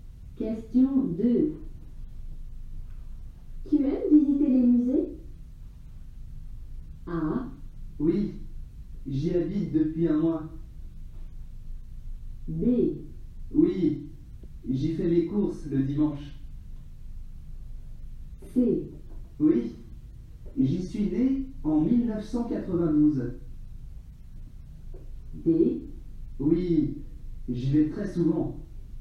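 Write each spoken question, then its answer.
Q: Tu aimes visiter les musées?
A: D: Oui, j'y vais très souvent.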